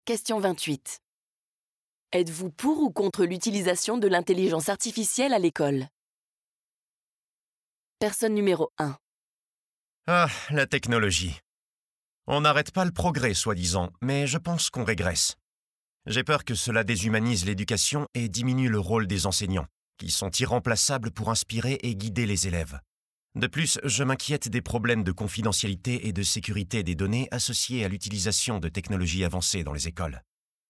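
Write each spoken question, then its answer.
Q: Êtes-vous pour ou contre l'utilisation de l'intelligence artificielle à l'école?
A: Contre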